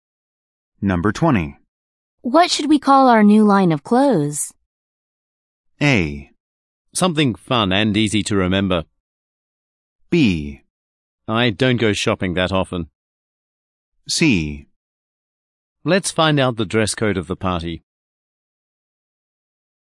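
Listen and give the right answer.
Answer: A: Something fun and easy to remember.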